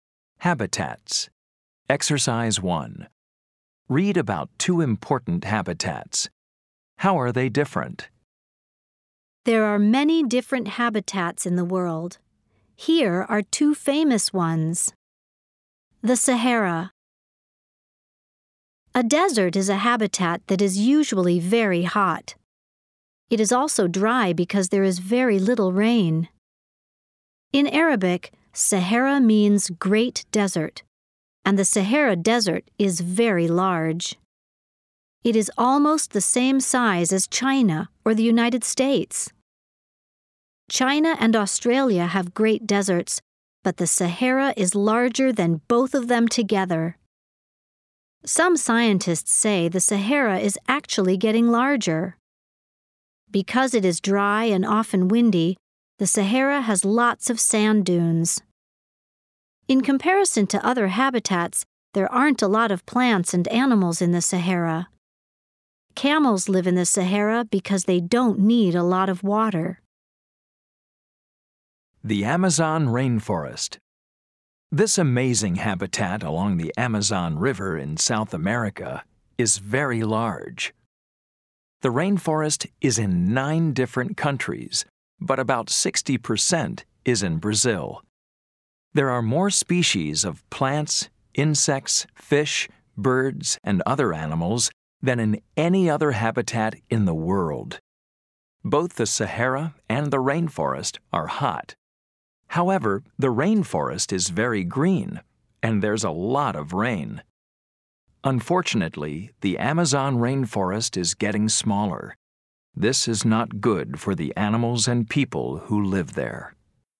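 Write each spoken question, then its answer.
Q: How are they different?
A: The Sahara is a dry desert with little rain and few plants and animals, and it is getting larger; the Amazon rainforest is green with lots of rain and more species than any other habitat, and it is getting smaller.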